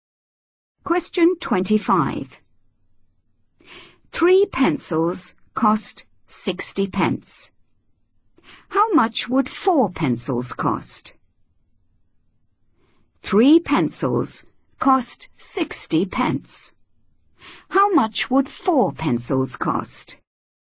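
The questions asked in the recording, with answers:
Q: How much would four pencils cost?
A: 80 pence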